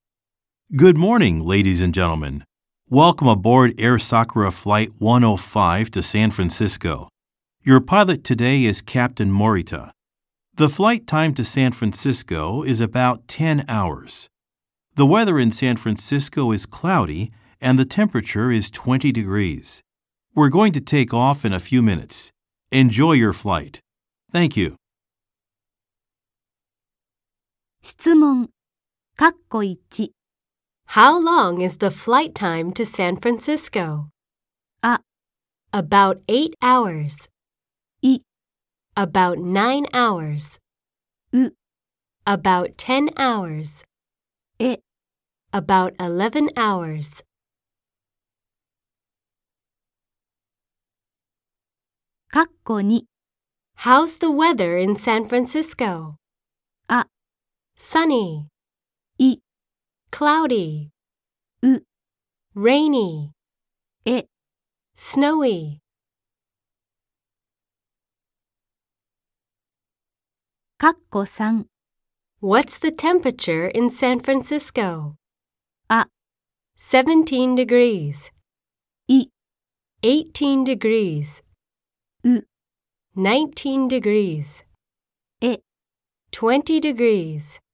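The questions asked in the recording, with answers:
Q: How long is the flight time to San Francisco?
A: う: About 10 hours.

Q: How's the weather in San Francisco?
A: い: Cloudy.

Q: What's the temperature in San Francisco?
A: え: 20 degrees.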